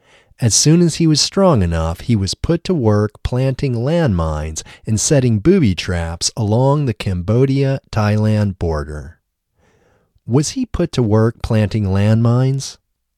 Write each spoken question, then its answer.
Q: Was he put to work planting landmines?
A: Yes, he was put to work planting landmines.